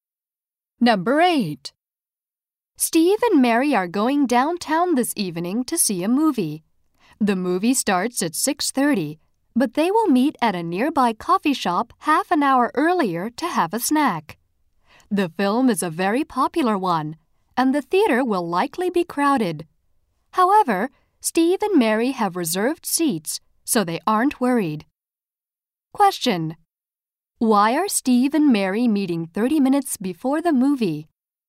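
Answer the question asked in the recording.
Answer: To have a snack at a coffee shop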